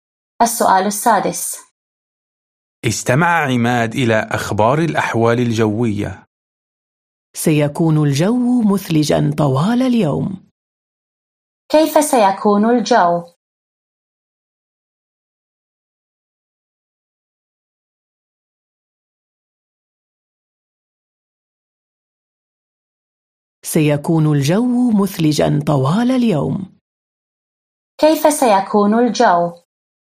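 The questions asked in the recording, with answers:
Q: كيف سيكون الجو؟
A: مثلجاً طوال اليوم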